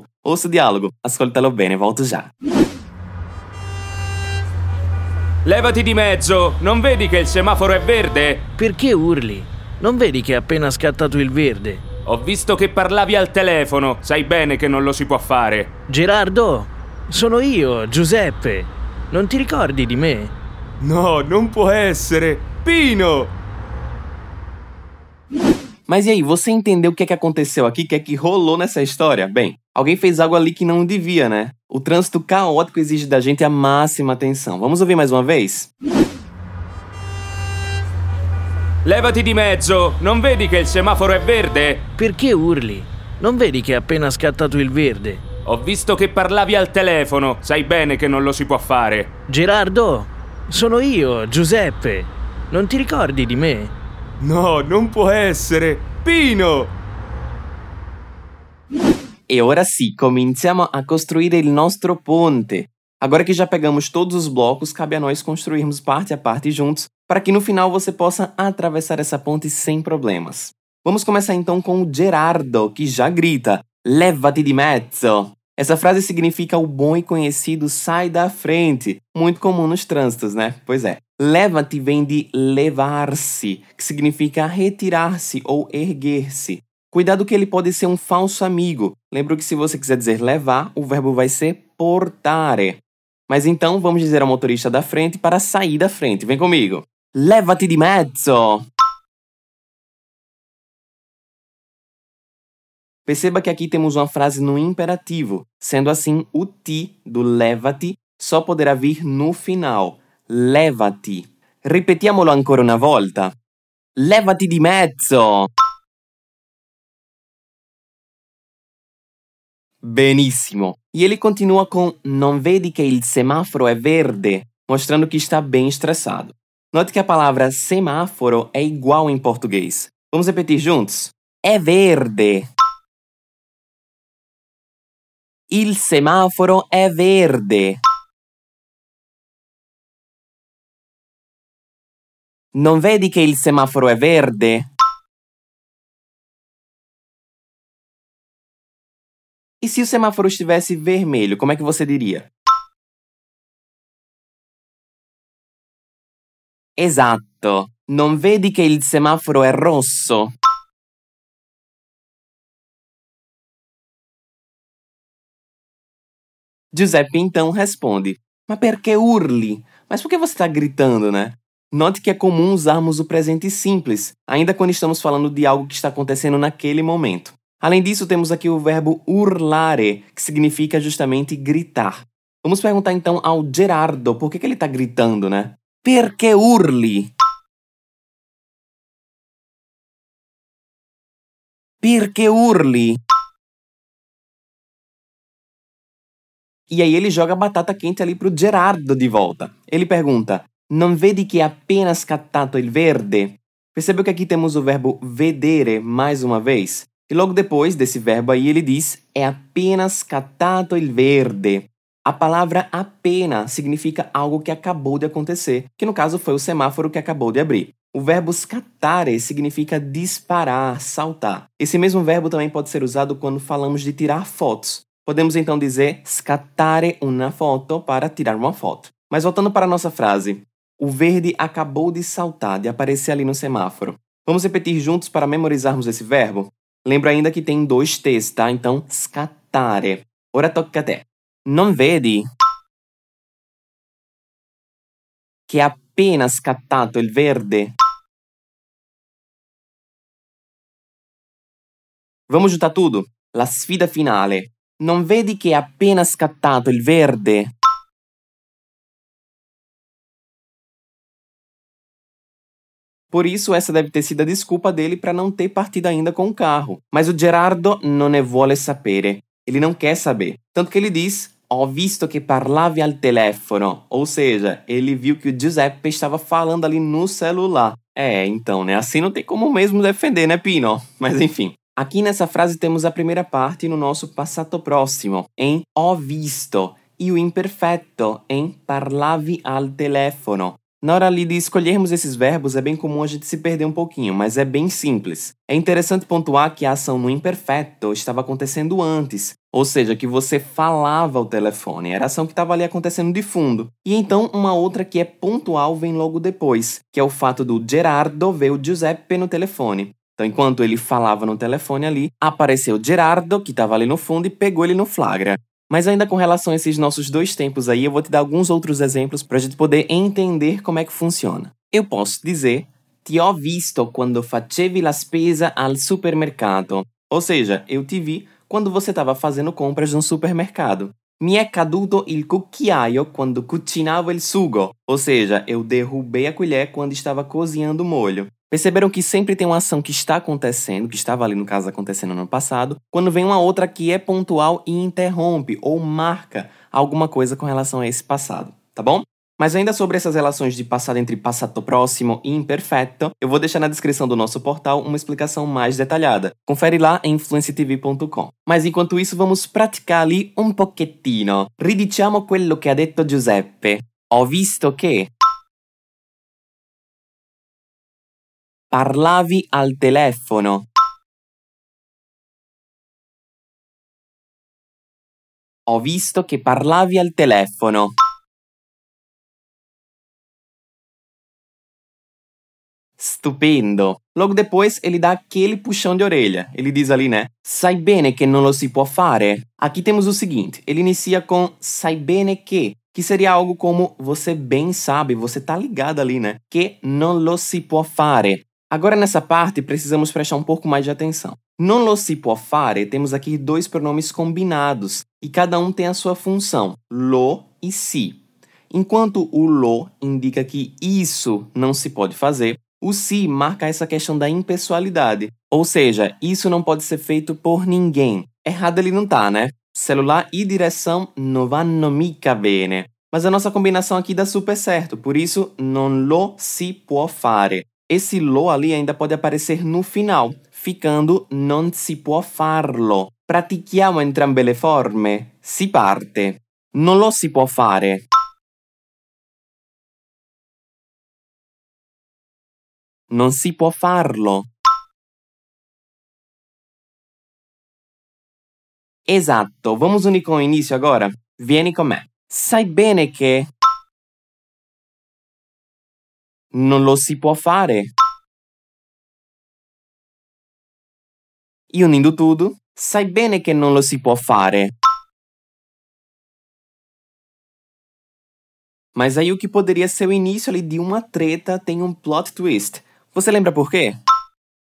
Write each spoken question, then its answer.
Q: Mas aí o que poderia ser o início ali de uma treta tem um plot twist. Você lembra por quê?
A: Ah, pois então, não é que o Giuseppe já conhecia o Gerardo?